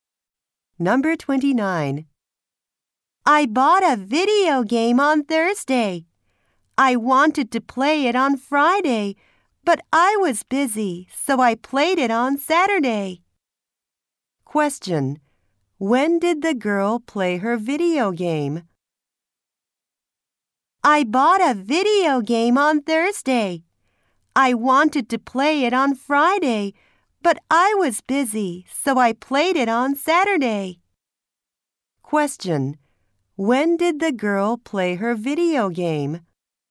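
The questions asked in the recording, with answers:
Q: When did the girl play her video game?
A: On Saturday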